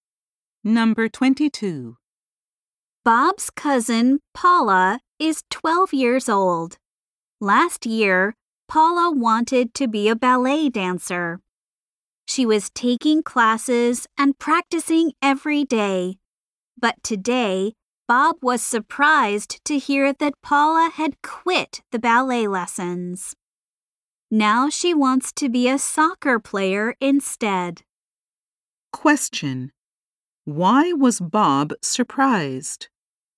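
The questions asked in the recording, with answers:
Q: Why was Bob surprised?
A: Paula had quit her ballet lessons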